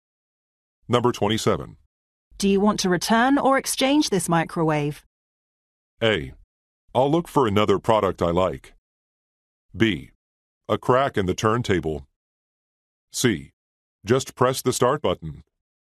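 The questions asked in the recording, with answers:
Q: Do you want to return or exchange this microwave?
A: A: I'll look for another product I like.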